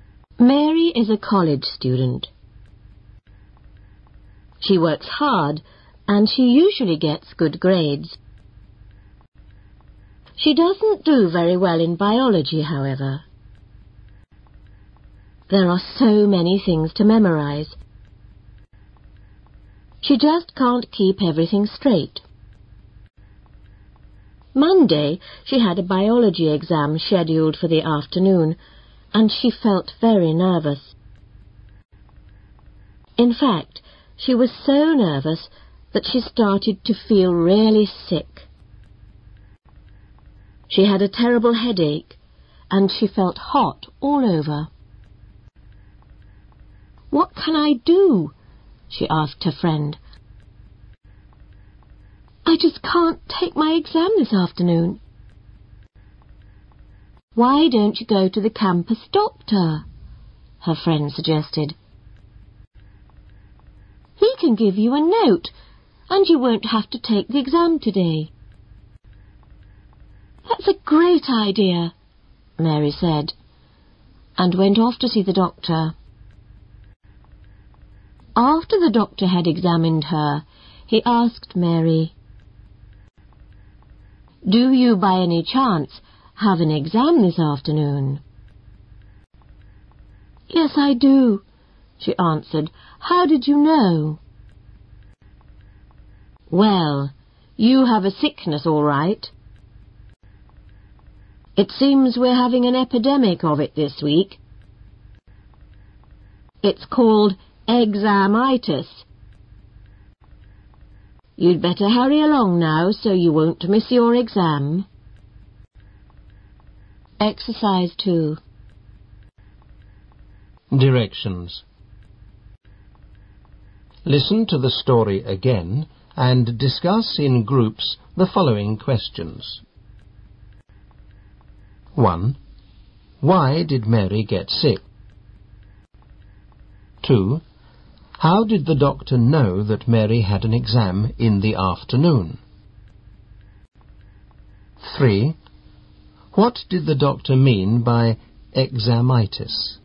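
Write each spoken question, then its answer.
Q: Why did Mary get sick?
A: She was very nervous about her biology exam.

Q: What did the doctor mean by examitis?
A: Feeling sick from nerves about an exam, not a real illness.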